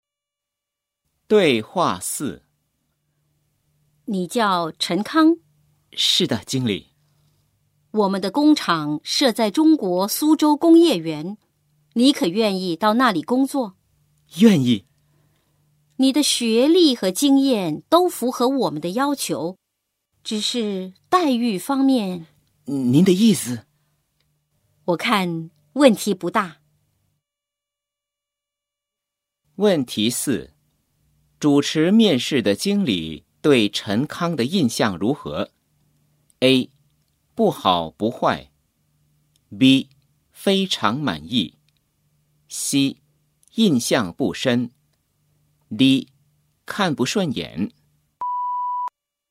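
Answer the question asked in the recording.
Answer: B: 非常满意。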